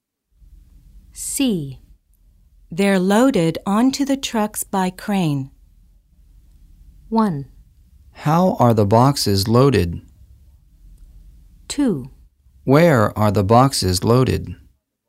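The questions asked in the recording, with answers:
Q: They're loaded onto the trucks by crane.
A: 1: How are the boxes loaded?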